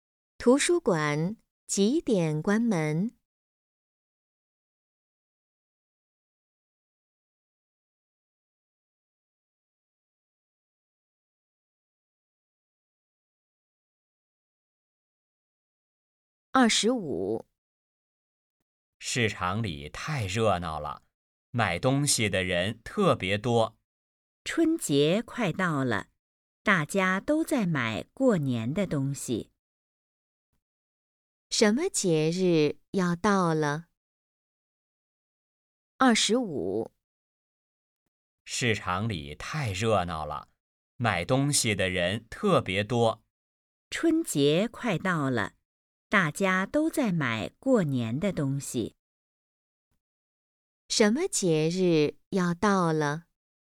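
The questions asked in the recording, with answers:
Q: 什么节日要到了?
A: 春节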